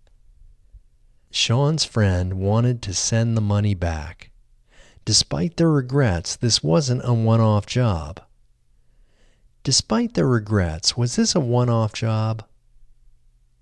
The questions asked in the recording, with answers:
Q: Despite their regrets, was this a one-off job?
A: No, despite their regrets, this wasn't a one-off job.